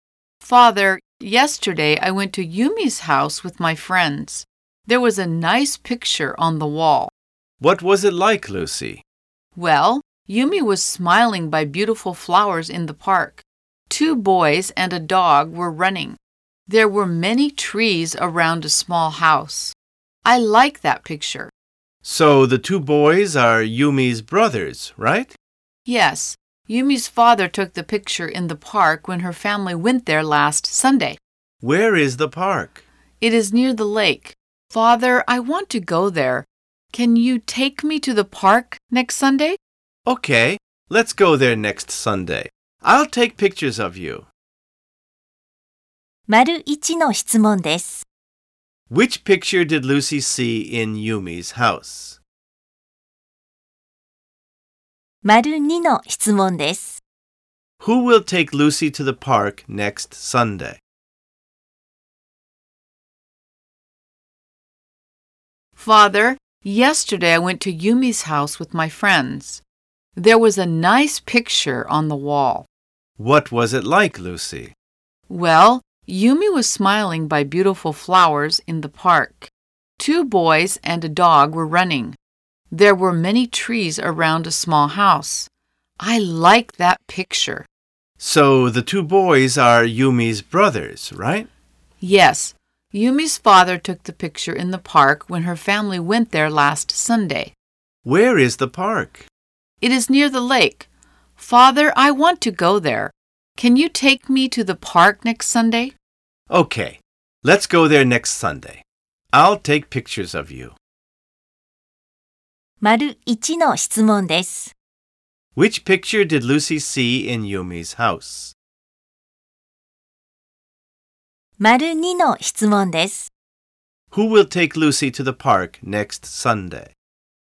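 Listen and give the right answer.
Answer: Her father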